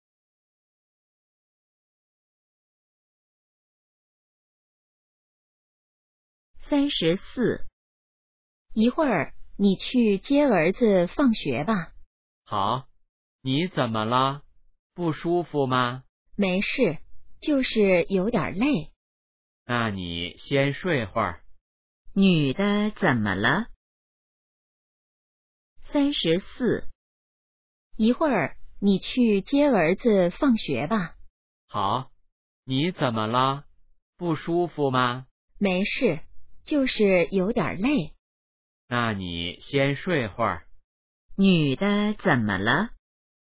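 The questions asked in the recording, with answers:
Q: 女的怎么了?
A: 有点累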